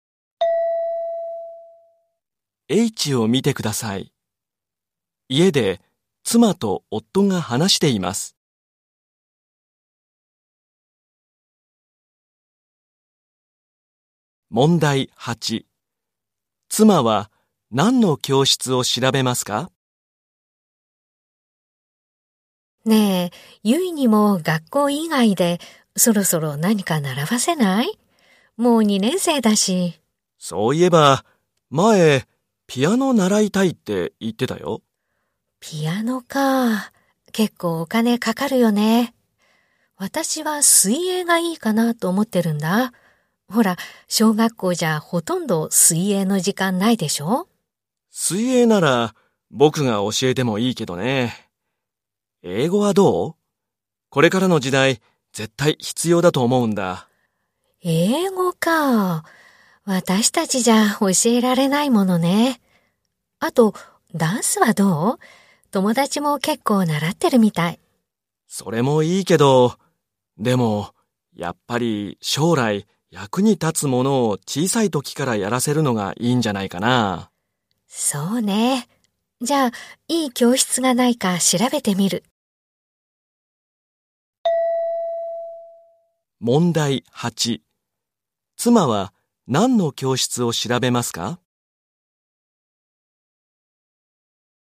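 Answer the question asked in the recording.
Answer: 英語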